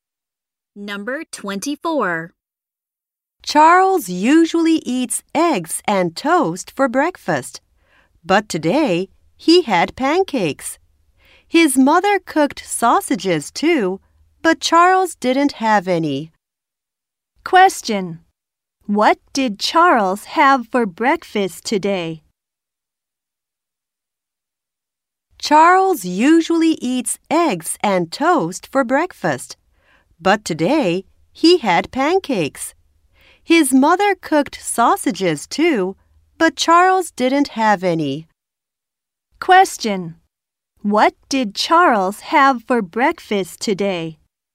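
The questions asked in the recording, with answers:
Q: Question. What did Charles have for breakfast today?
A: Pancakes.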